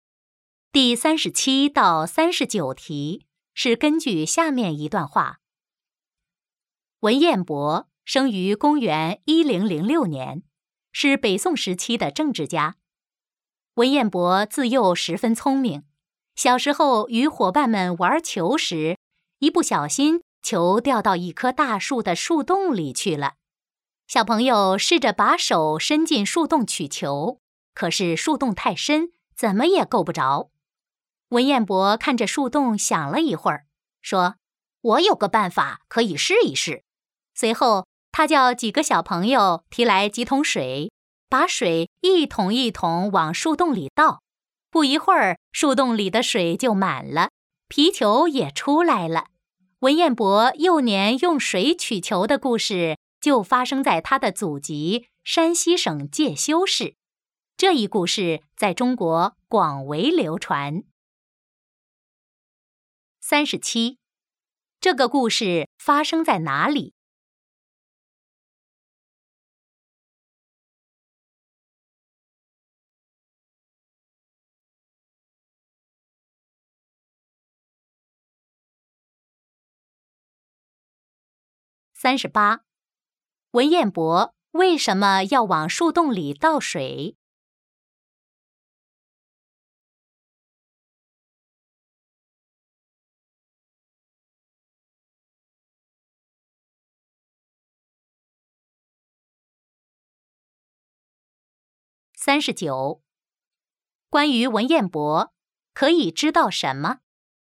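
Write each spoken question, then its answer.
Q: 这个故事发生在哪里?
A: 山西省介休市

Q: 文彦博为什么要往树洞里倒水?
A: 让皮球浮出来

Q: 关于文彦博,可以知道什么?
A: 他从小很聪明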